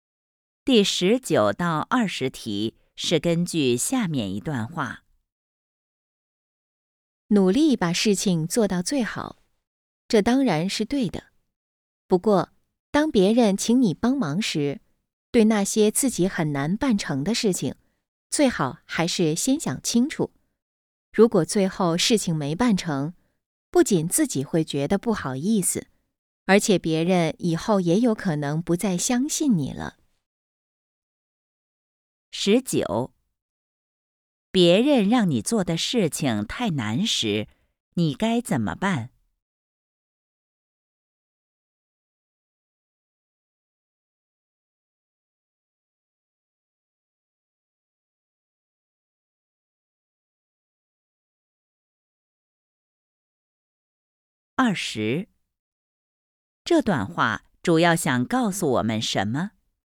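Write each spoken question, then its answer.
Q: 别人让你做的事情太难时,你该怎么办?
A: 最好先想清楚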